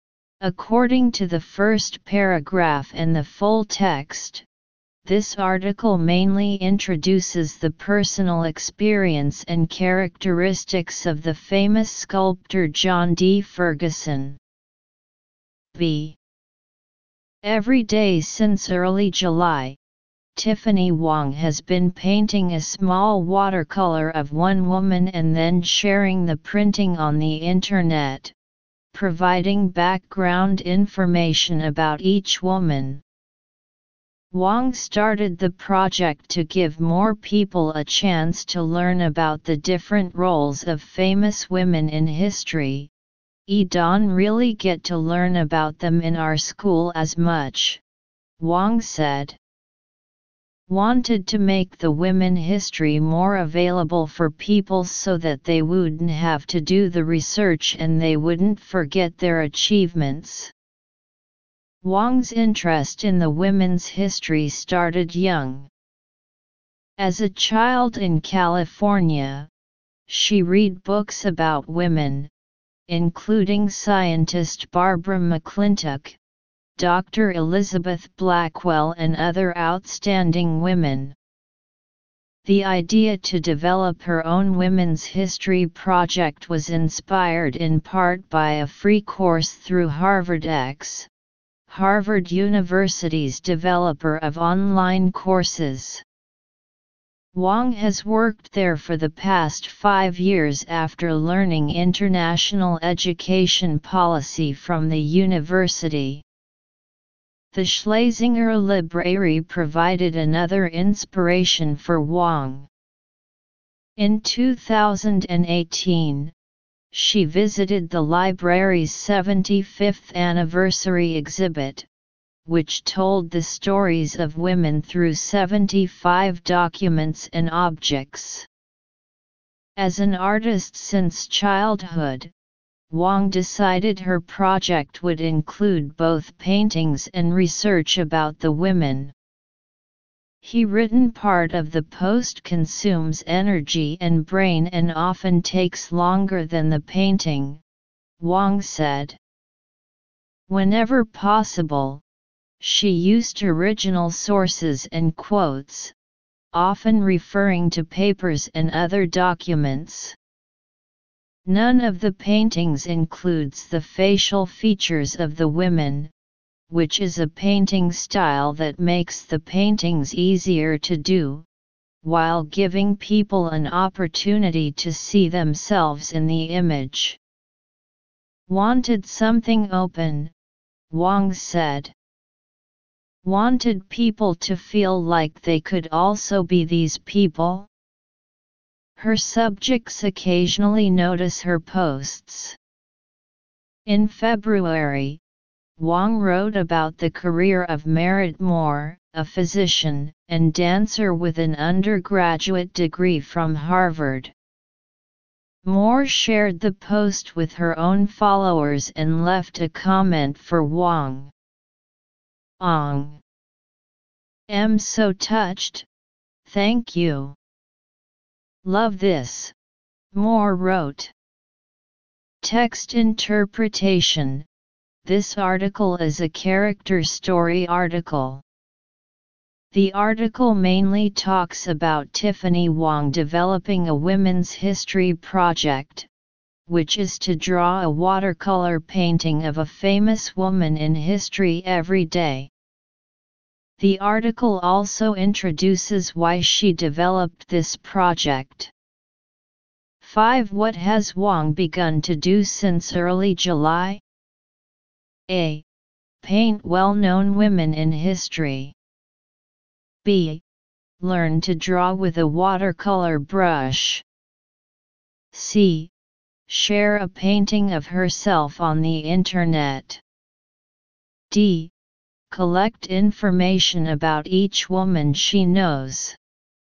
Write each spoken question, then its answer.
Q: What has Wong begun to do since early July?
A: Choose A